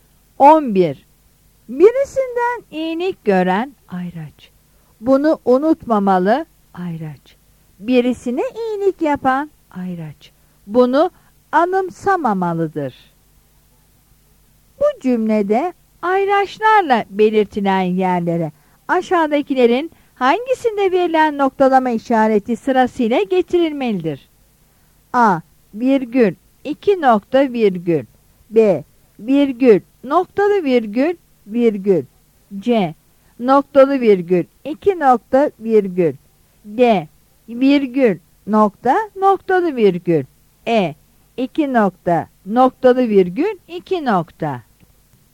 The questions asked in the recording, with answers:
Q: Bu cümlede ayraçlarla belirtilen yerlere aşağıdakilerin hangisinde verilen noktalama işareti sırasıyla getirilmelidir?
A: Yanıt B'dir.